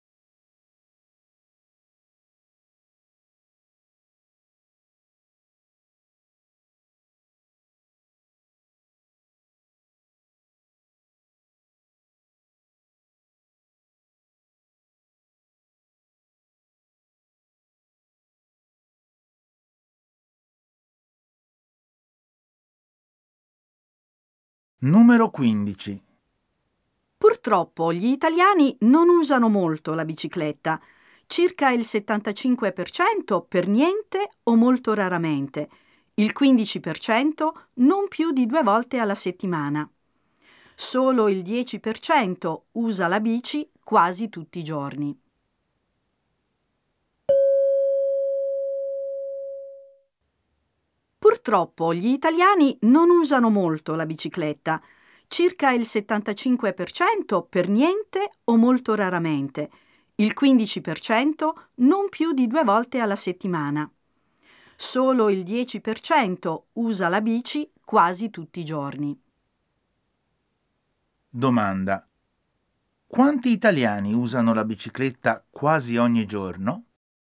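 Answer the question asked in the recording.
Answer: Il 10%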